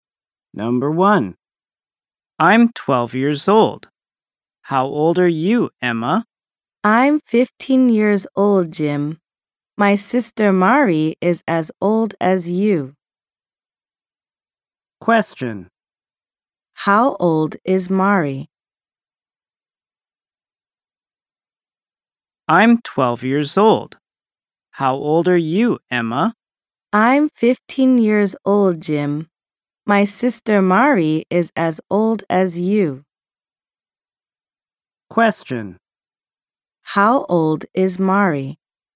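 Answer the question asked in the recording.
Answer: 12 years old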